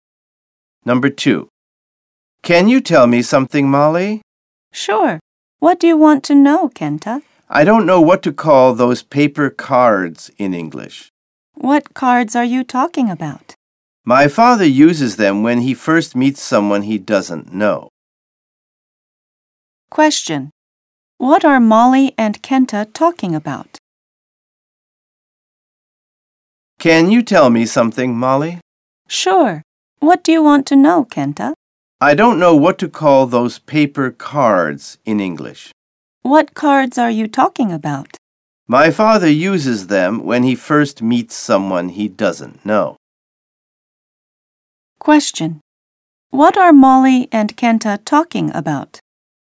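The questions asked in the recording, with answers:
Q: What are Molly and Kenta talking about?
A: Business cards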